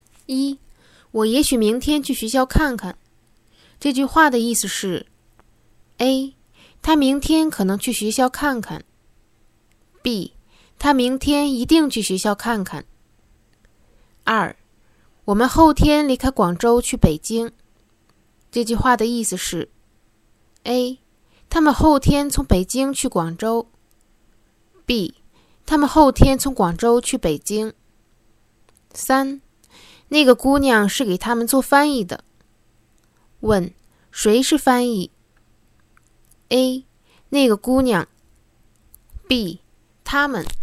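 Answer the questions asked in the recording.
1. A. 他明天可能去学校看看。
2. B. 他们后天从广州去北京。
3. A. 那个姑娘。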